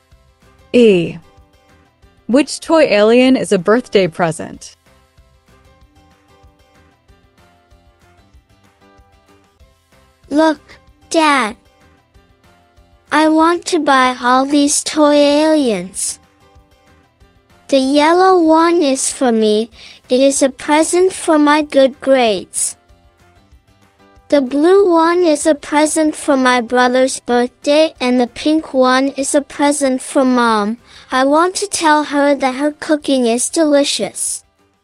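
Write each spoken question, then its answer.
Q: Which toy alien is a birthday present?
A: The blue one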